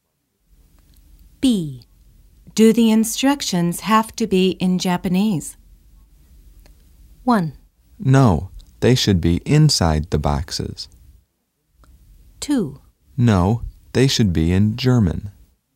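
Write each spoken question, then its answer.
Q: Do the instructions have to be in Japanese?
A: 2: No, they should be in German.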